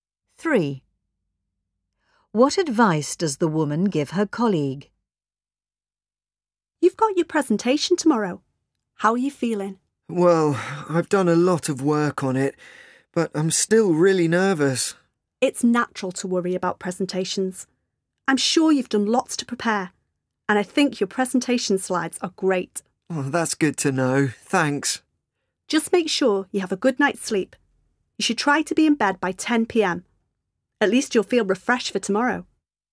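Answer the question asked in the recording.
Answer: Get a good night's sleep and be in bed by 10 p.m.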